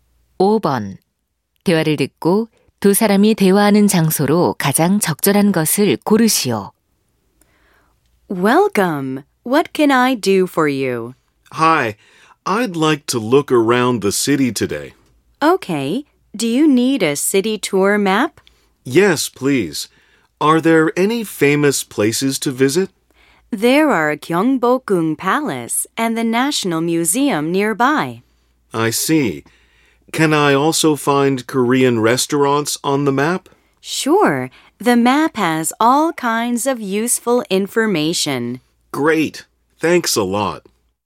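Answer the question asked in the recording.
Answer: 관광 안내소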